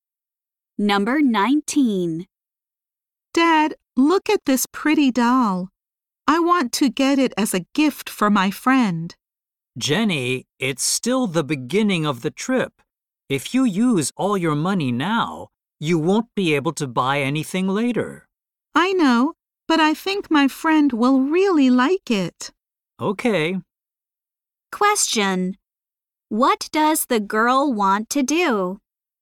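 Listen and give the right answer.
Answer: Buy a doll as a gift for her friend.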